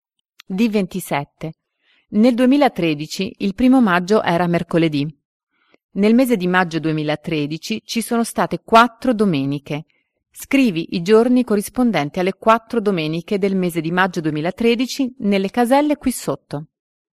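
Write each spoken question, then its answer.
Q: Scrivi i giorni corrispondenti alle 4 domeniche del mese di maggio 2013 nelle caselle qui sotto.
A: 5, 12, 19, 26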